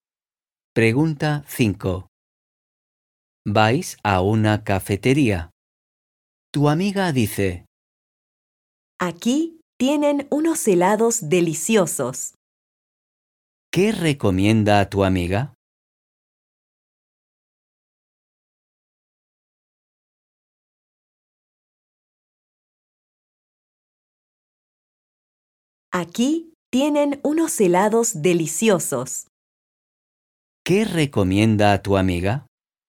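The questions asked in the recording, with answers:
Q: ¿Qué recomienda tu amiga?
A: Los helados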